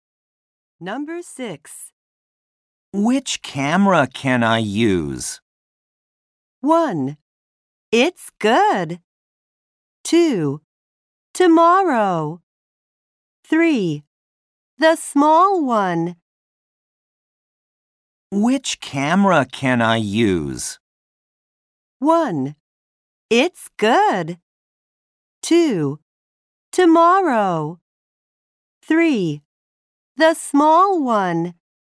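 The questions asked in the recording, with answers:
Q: Which camera can I use?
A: 3: The small one.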